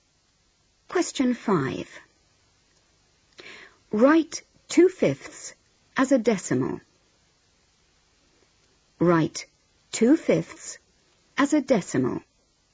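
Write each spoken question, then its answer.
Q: Write 2/5 as a decimal.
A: 0.4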